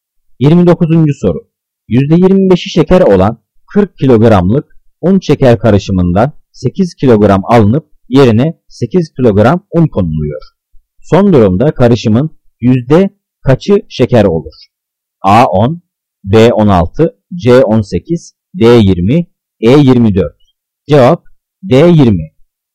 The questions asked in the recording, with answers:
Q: Son durumda karışımın yüzde kaçı şeker olur?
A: Cevap D20.